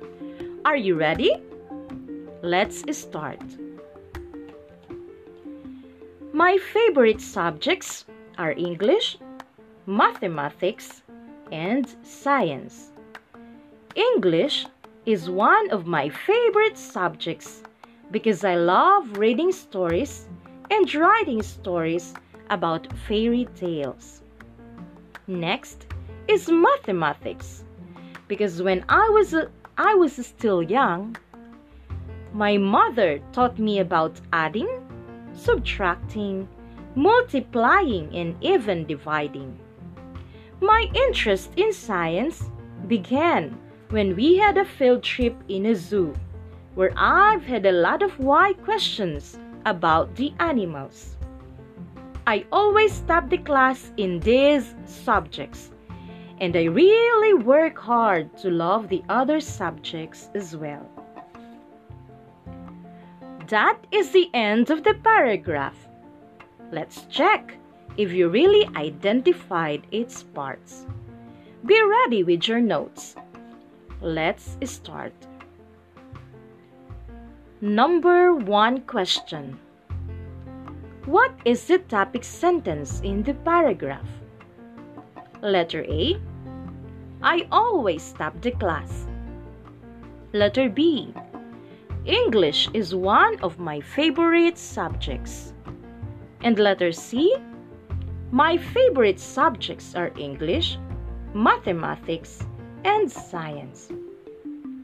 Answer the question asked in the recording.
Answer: The correct answer is letter C.